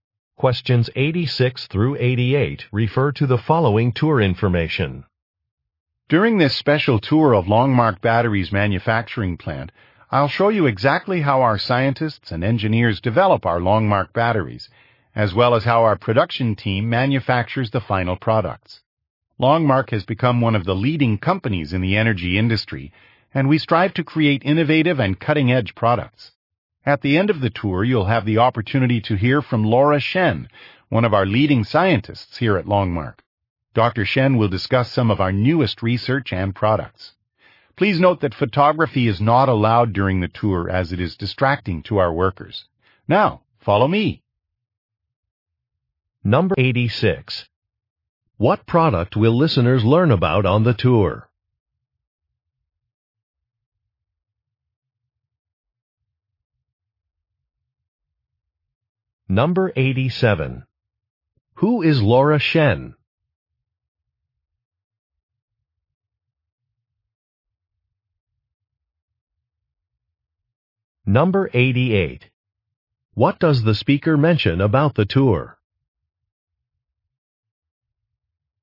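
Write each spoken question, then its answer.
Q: What product will listeners learn about on the tour?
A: Batteries

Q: Who is Laura Shen?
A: A scientist at Longmark

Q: What does the speaker mention about the tour?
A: Photography is not allowed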